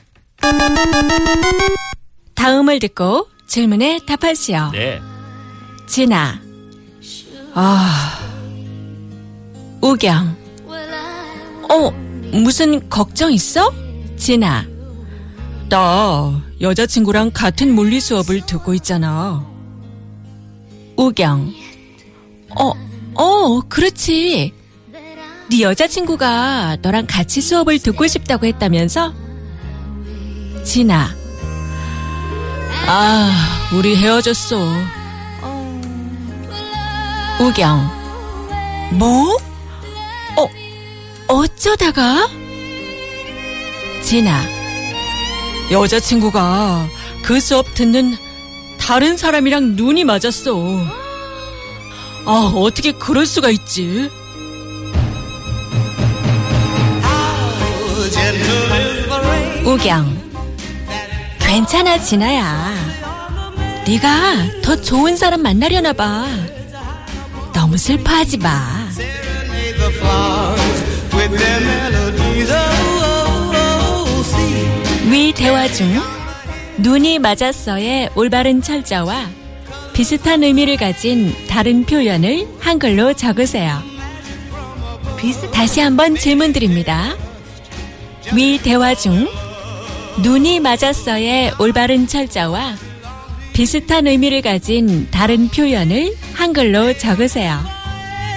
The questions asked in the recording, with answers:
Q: 위 대화 중 눈이 맞았어의 올바른 철자와 비슷한 의미를 가진 다른 표현을 한글로 적으세요.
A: We're, you know, 반하다, 사랑에 빠지다, both were acceptable for fall in love.